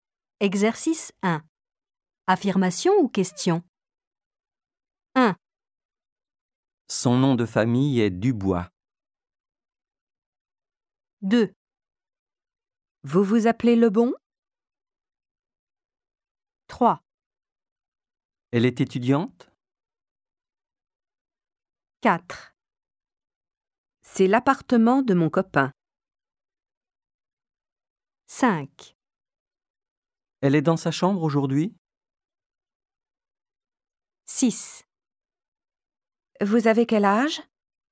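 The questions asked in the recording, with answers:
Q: Affirmation ou question?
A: Question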